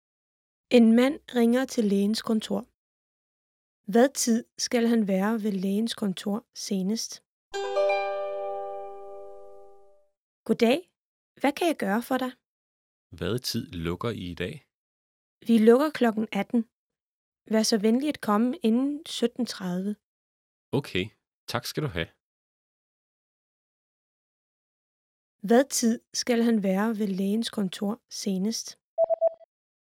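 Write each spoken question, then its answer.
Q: Hvad tid skal han være ved lægens kontor senest?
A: Klokken 17.30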